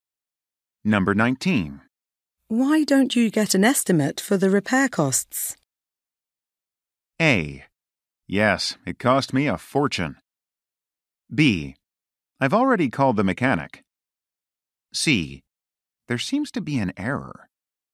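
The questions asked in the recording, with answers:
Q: Why don't you get an estimate for the repair costs?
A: B: I've already called the mechanic.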